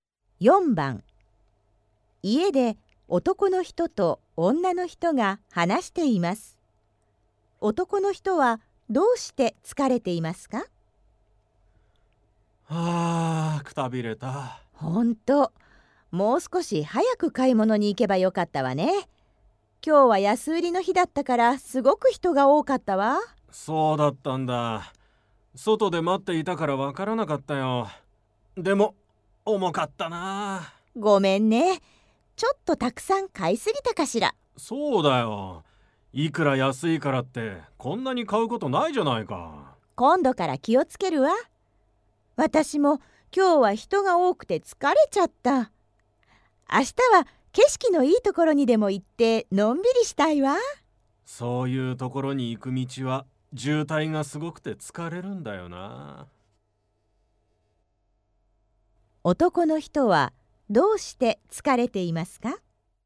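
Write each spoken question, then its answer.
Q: 男の人はどうして疲れていますか?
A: たくさん買った重い荷物を持ったから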